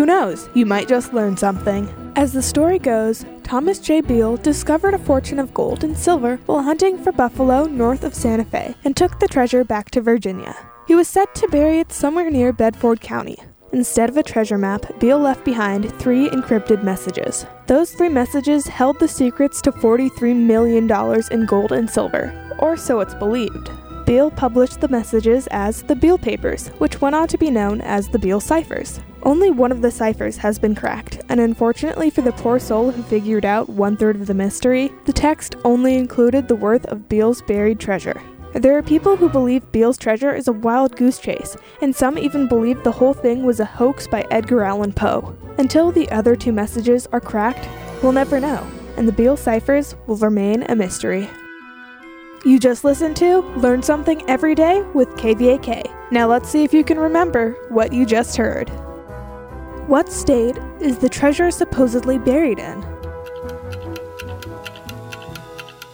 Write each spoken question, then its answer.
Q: What state is the treasure supposedly buried in?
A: Beale's treasure is supposedly buried in Virginia.